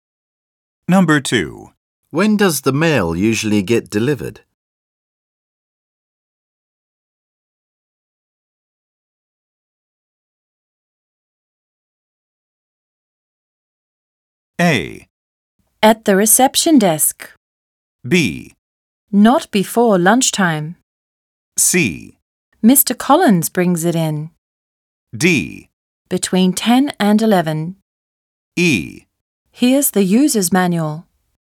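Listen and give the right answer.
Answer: B: Not before lunchtime. / D: Between 10 and 11.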